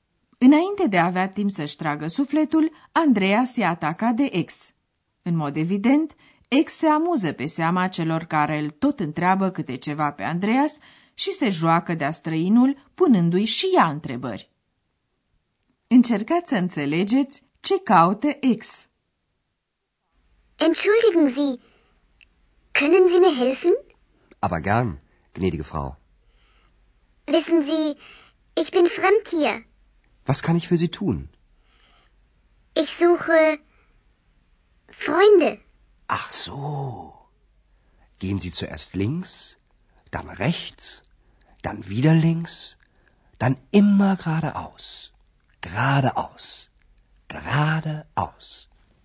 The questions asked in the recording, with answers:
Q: Încercați să înțelegeți ce caute ex.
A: Ex caută prieteni.